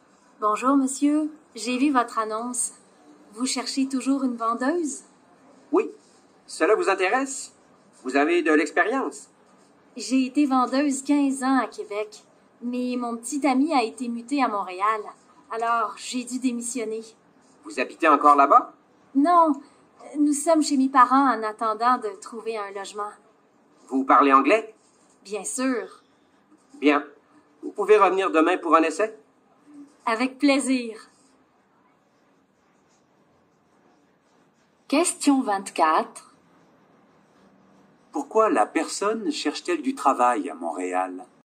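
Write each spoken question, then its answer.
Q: Pourquoi la personne cherche-t-elle du travail à Montréal?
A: Parce que son petit ami a été muté à Montréal.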